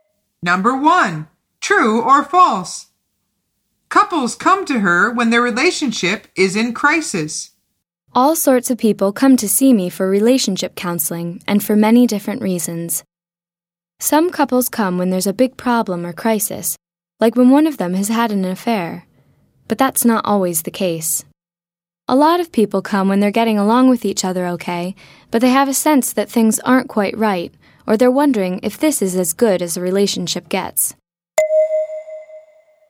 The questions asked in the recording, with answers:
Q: True or false? Couples come to her when their relationship is in crisis.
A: The answer is false.